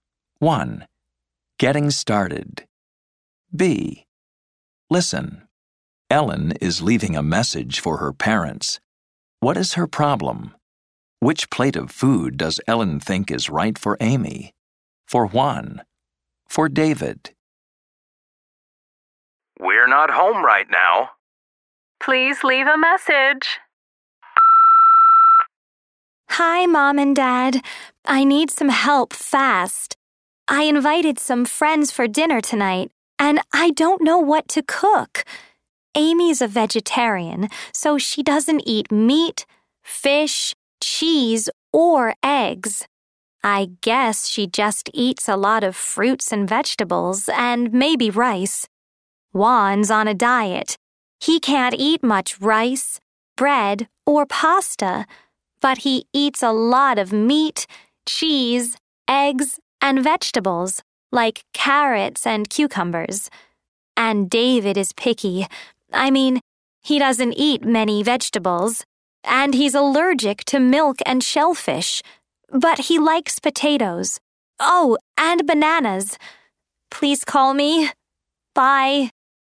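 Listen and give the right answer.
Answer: She invited friends for dinner and doesn't know what to cook.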